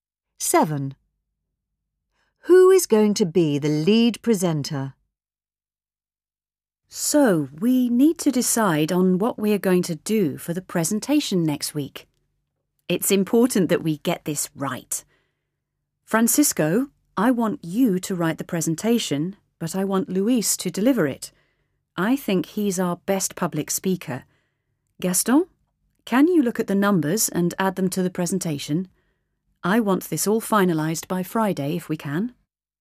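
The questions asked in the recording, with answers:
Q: Who is going to be the lead presenter?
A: Luis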